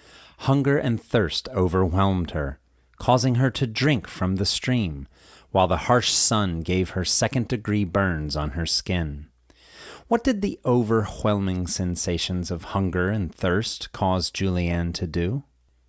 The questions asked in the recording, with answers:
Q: What did the overwhelming sensations of hunger and thirst cause Julianne to do?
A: Hunger and thirst caused her to drink from the stream.